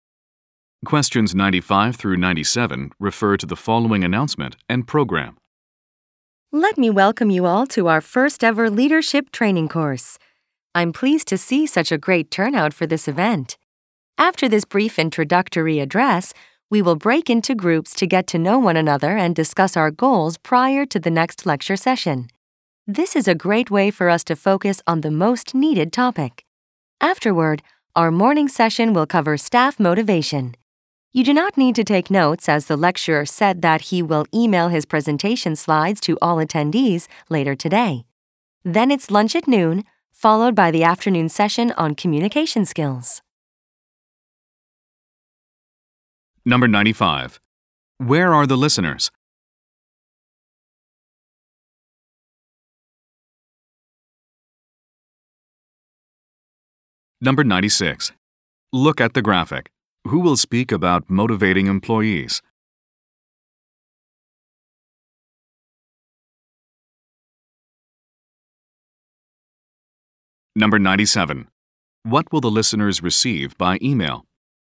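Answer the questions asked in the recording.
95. At a leadership training course
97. The lecturer's presentation slides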